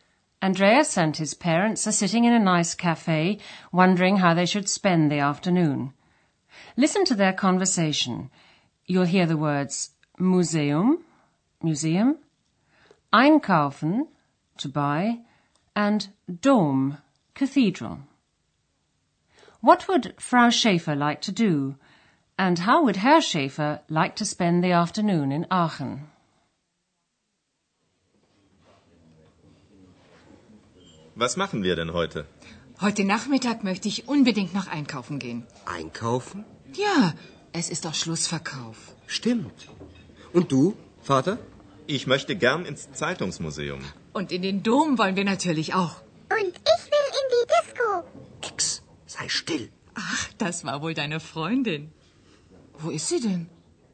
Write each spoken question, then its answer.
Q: What would Frau Schaefer like to do?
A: Frau Schäfer would like to go shopping.

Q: And how would Herr Schaefer like to spend the afternoon in Aachen?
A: Herr Schaefer would like to go to the newspaper museum, and both say they'd like to see Aachen Cathedral.